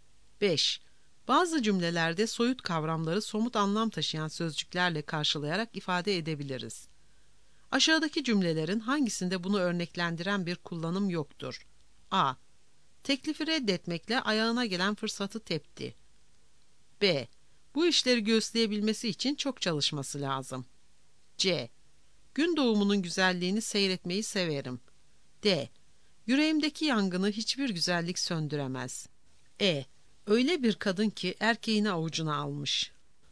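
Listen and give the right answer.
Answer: C: Gün doğumunun güzelliğini seyretmeyi severim.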